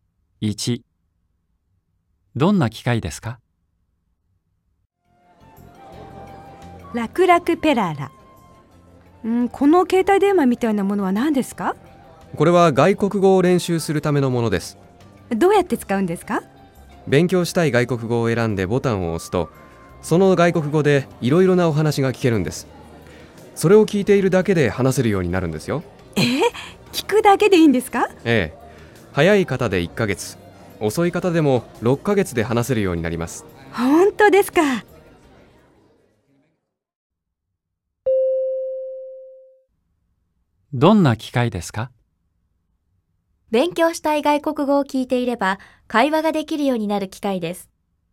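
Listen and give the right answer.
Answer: ○(勉強したい外国語を聞いていれば会話ができるようになる機械です。)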